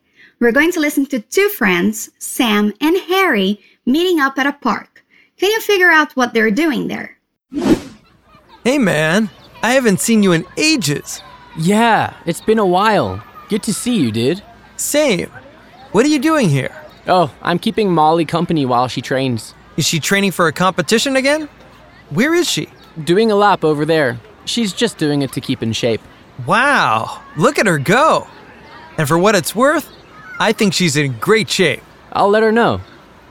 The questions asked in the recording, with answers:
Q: Can you figure out what they're doing there?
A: It seems that Harry is keeping Molly company.